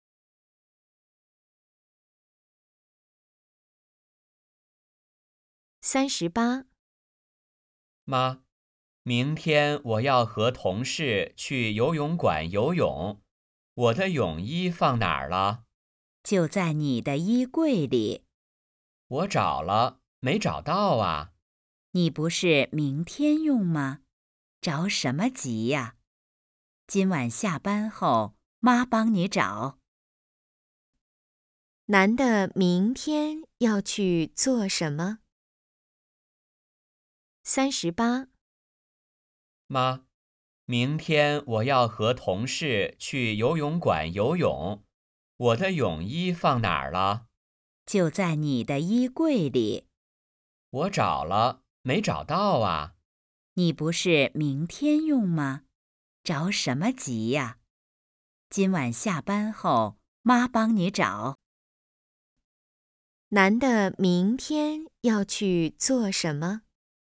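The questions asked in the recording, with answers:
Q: 男的明天要去做什么?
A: 游泳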